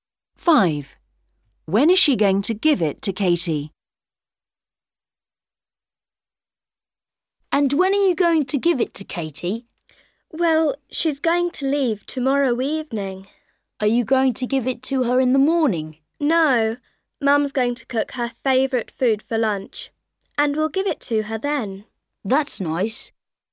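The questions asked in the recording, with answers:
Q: When is she going to give it to Katie?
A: at lunch (tomorrow)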